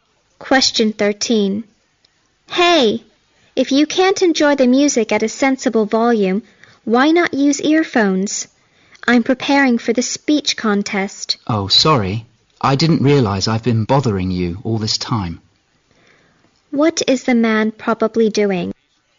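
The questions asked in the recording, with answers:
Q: What is the man probably doing?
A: Playing music loudly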